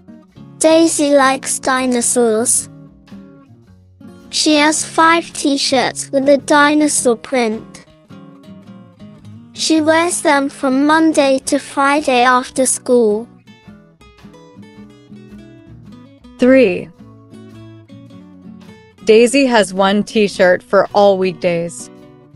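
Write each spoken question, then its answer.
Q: Daisy has 1 t-shirt for all weekdays.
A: False; she has 5 t-shirts, one for each weekday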